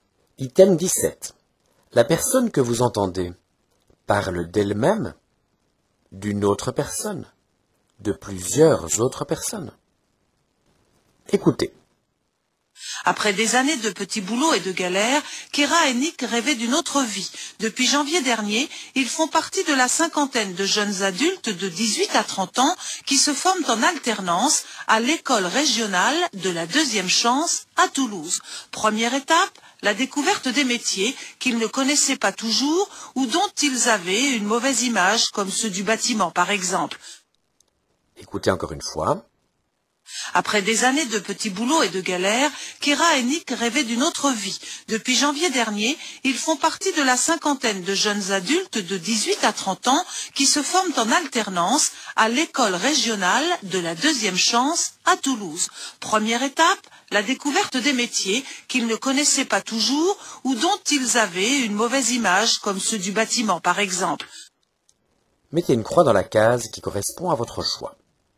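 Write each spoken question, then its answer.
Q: La personne que vous entendez parle d'elle-même, d'une autre personne, de plusieurs autres personnes.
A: de plusieurs autres personnes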